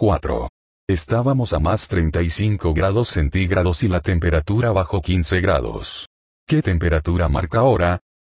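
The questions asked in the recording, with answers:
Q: ¿Qué temperatura marca ahora?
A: 20 grados centígrados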